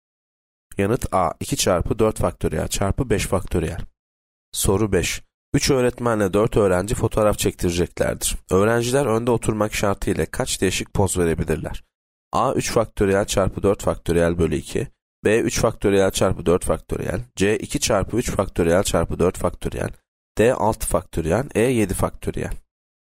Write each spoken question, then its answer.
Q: Öğrenciler önde oturmak şartıyla kaç değişik poz verebilirler?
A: Yanıt B 3 faktöriyel çarpı 4 faktöriyel.